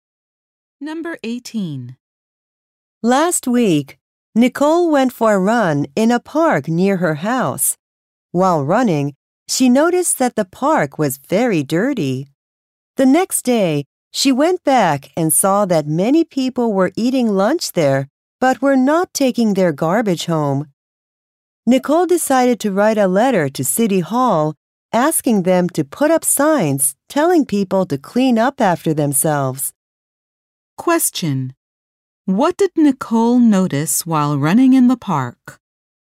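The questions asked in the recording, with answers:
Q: What did Nicole notice while running in the park?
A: The park was very dirty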